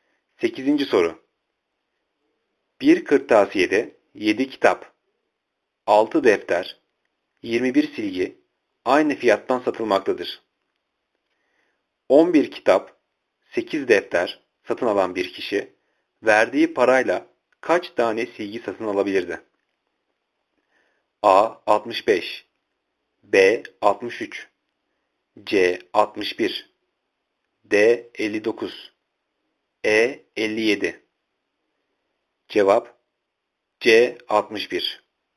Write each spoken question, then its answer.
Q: 11 kitap, 8 defter satın alan bir kişi verdiği parayla kaç tane silgi satın alabilirdi?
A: Cevap C. 61